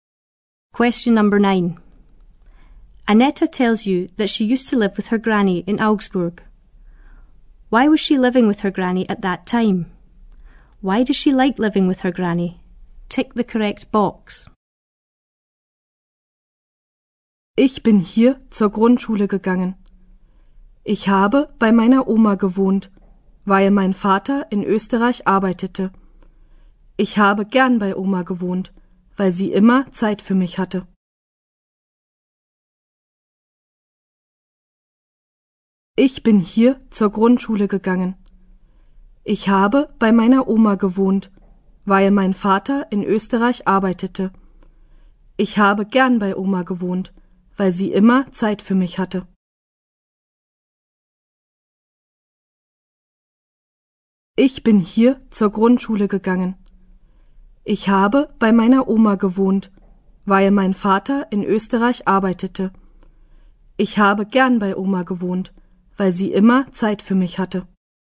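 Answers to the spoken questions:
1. Her father was working in Austria
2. Granny always had time for her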